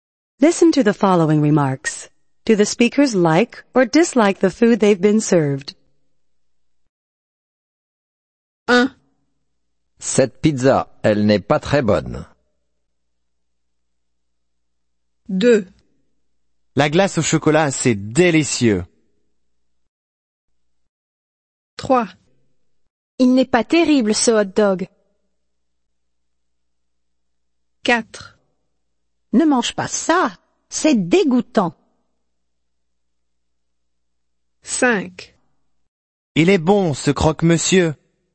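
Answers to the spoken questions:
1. dislike
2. like
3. dislike
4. dislike
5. like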